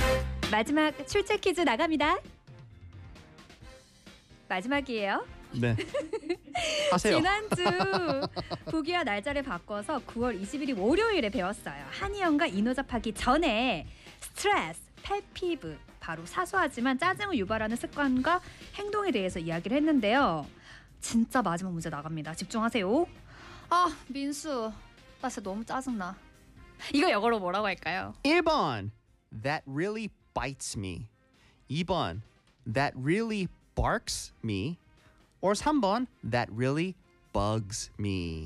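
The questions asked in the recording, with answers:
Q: 이거 영어로 뭐라고 할까요?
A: 3: that really bugs me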